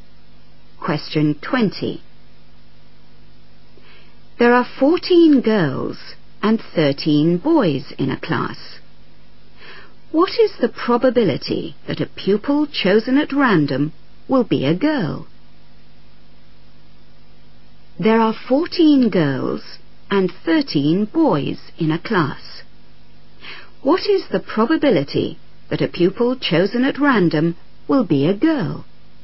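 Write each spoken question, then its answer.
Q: What is the probability that a pupil chosen at random will be a girl?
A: 14/27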